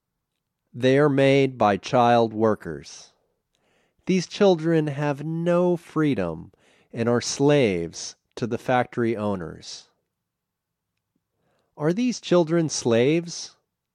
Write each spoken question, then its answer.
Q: Are these children slaves?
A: Yes, they are slaves.